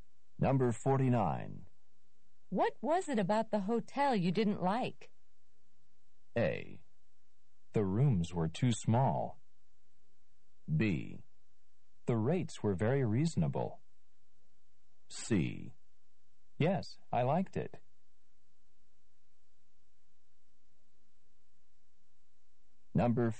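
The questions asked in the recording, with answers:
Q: What was it about the hotel you didn't like?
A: A: The rooms were too small.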